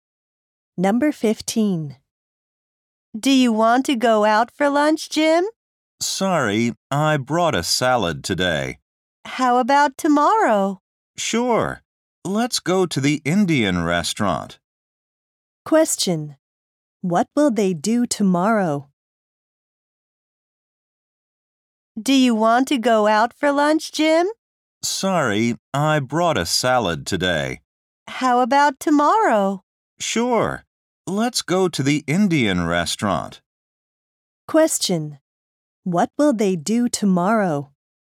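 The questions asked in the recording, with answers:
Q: What will they do tomorrow?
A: Go to an Indian restaurant for lunch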